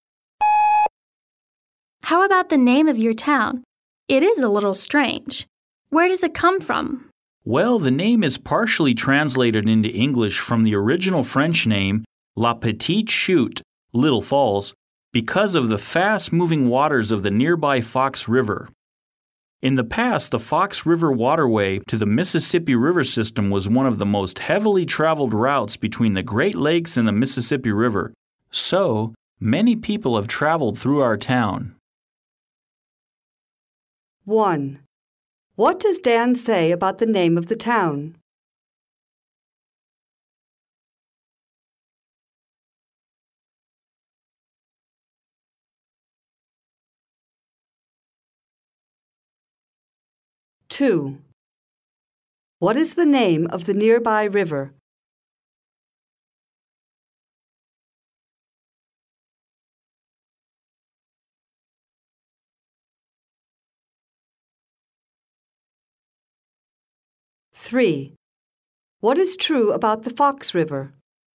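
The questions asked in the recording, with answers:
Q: What does Dan say about the name of the town?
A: It is partially translated into English from the French name La Petite Chute (Little Falls)

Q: What is the name of the nearby river?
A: The Fox River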